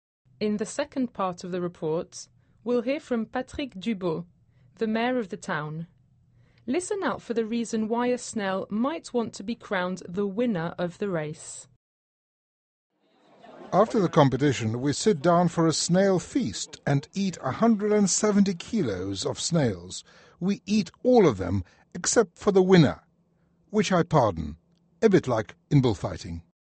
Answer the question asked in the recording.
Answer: Well, except the winning snail, which is pardoned.